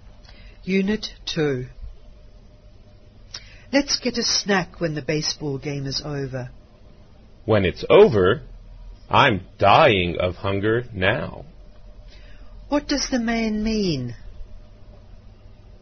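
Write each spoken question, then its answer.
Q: What does the man mean?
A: He is very hungry and wants to eat now.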